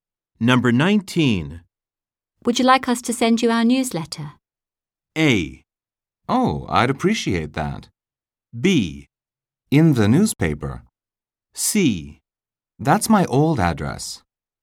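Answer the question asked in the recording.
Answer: A: Oh, I'd appreciate that.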